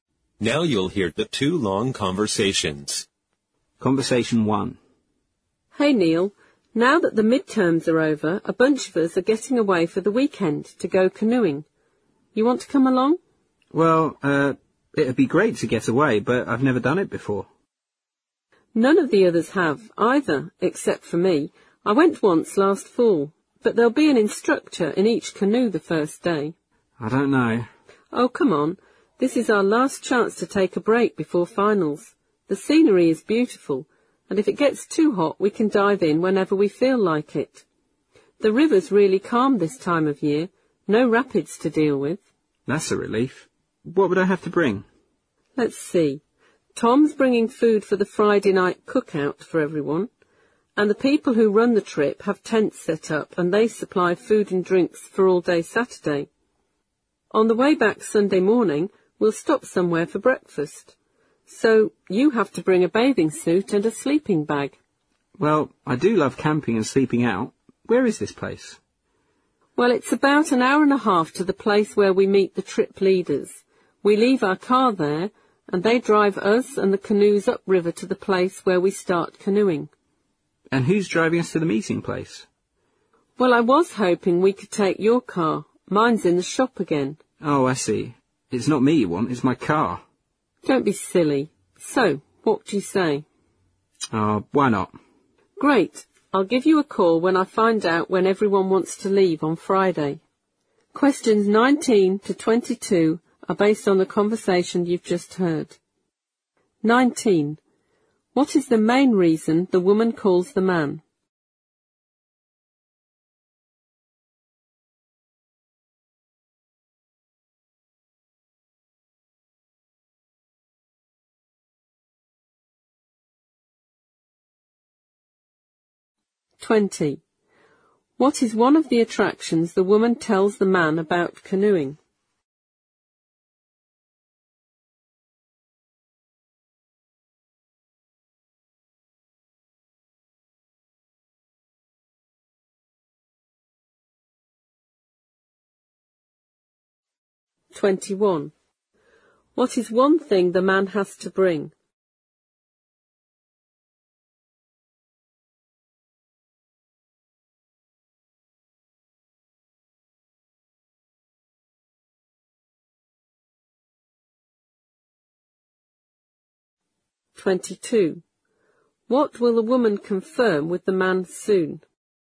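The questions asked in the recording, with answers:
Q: What is the main reason the woman calls the man?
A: To invite him to go canoeing for the weekend

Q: What is one of the attractions the woman tells the man about canoeing?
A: The beautiful scenery

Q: What is one thing the man has to bring?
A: A bathing suit (or a sleeping bag)

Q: What will the woman confirm with the man soon?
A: When everyone wants to leave on Friday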